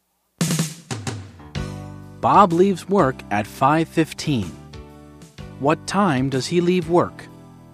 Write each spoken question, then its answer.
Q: What time does he leave work?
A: He leaves work at 5:15.